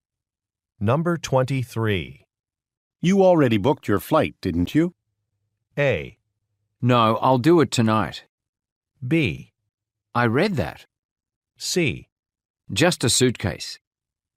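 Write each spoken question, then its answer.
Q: You already booked your flight, didn't you?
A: A: No, I'll do it tonight.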